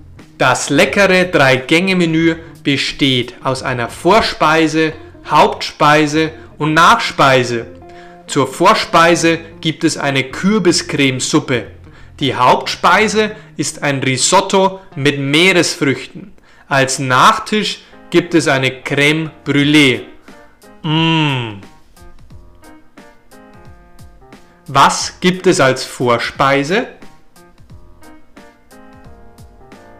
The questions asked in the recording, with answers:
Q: Was gibt es als Vorspeise?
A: Eine Kürbiscremesuppe.